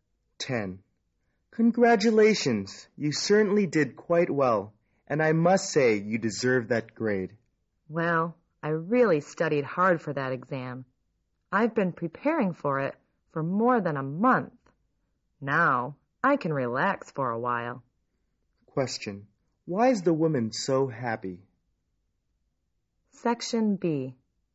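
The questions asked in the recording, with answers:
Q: Why is the woman so happy?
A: She got a good grade on the exam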